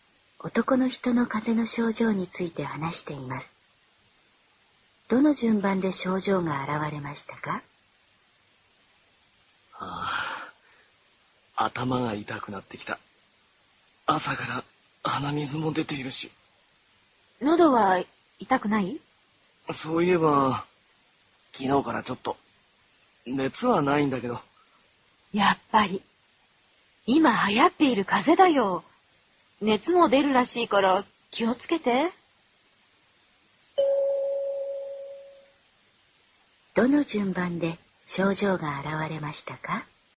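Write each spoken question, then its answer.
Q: どの順番で症状が現れましたか?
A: 喉の痛み→鼻水→頭痛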